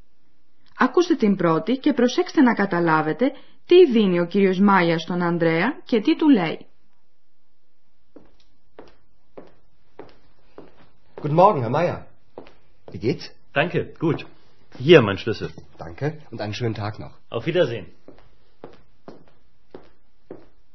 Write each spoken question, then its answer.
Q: Ακούστε την πρώτη και προσέξτε να καταλάβετε τι δίνει ο κύριος Μάια στον Ανδρέα και τι του λέει.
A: Ο κύριος Μάγερ βάζει το κλειδί του πάνω στο μπάγκο και λέει «Ορίστε το κλειδί μου».